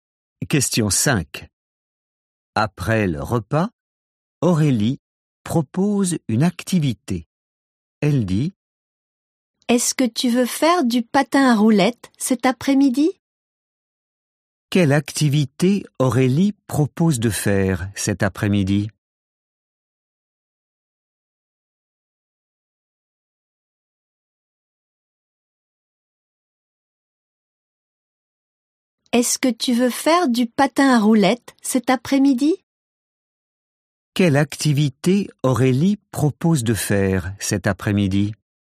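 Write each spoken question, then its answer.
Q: Quelle activité Aurélie propose de faire cet après-midi?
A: Du patin à roulettes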